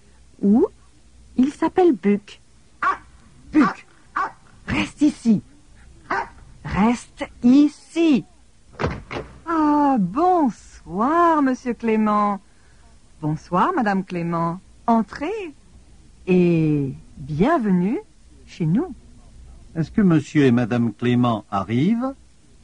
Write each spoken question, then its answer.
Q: Est-ce que monsieur et madame Clément arrivent?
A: Oui, monsieur et madame Clément arrivent.